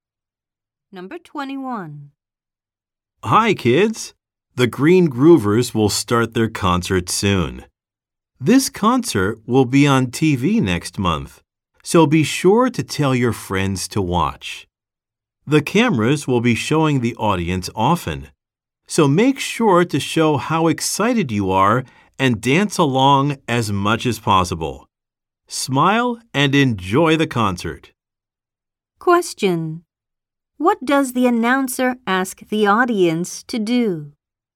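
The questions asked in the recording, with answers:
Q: What does the announcer ask the audience to do?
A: Show excitement and dance along.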